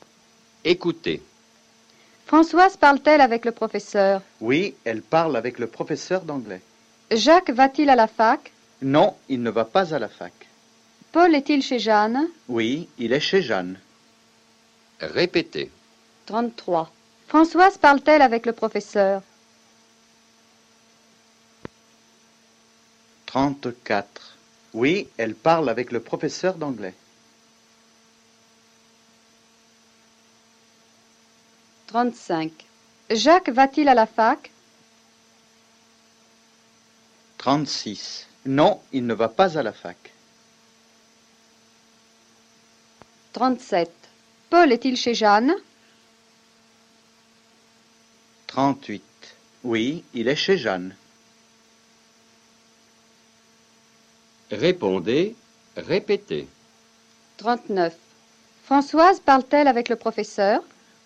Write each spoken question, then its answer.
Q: Françoise parle-t-elle avec le professeur?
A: Oui, elle parle avec le professeur d'anglais.